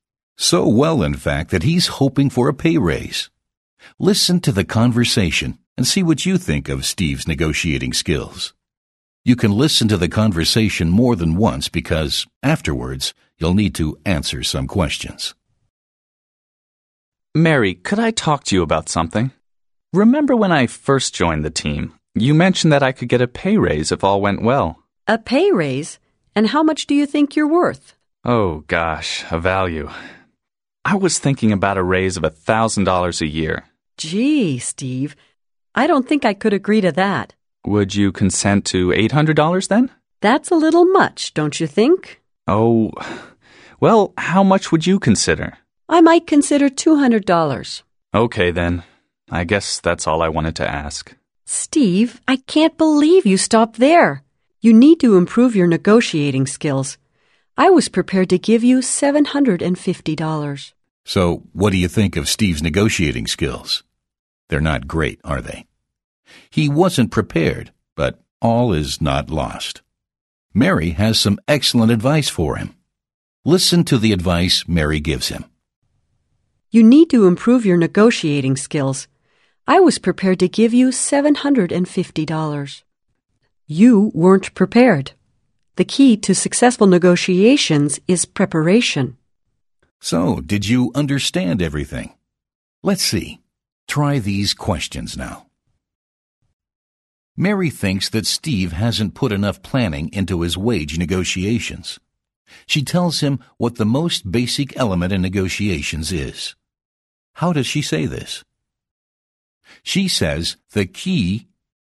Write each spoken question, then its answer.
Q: How does she say this? She says the key...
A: She says the key to successful negotiations is preparation.